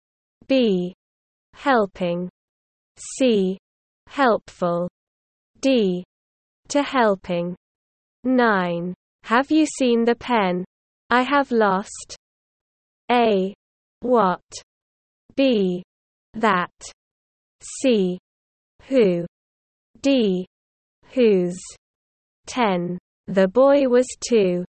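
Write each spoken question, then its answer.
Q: Have you seen the pen? I have lost.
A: B: That.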